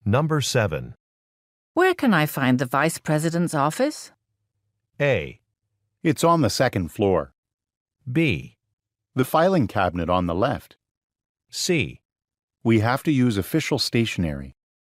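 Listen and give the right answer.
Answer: A: It's on the second floor.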